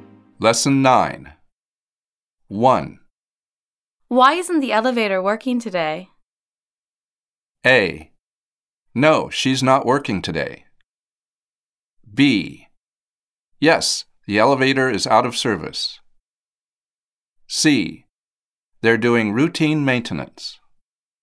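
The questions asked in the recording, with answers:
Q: Why isn't the elevator working today?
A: C: They're doing routine maintenance.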